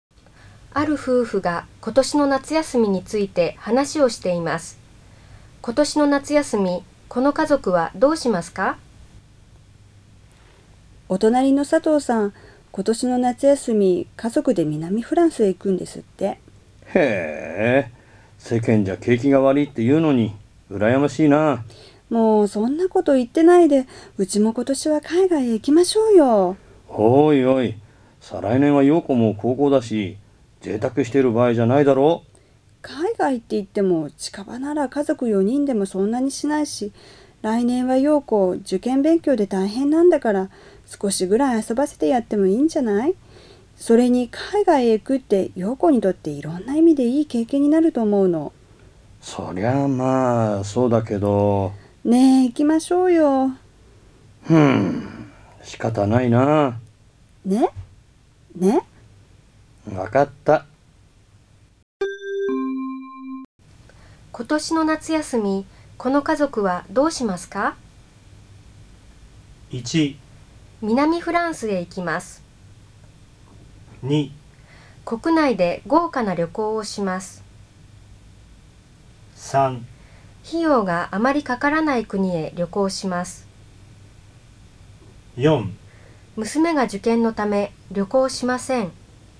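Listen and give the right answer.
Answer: 3: 費用があまりかからない国へ旅行します。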